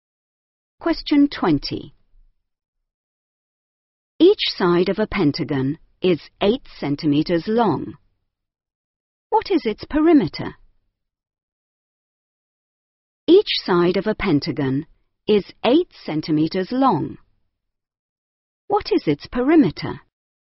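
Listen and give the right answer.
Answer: 40 centimeters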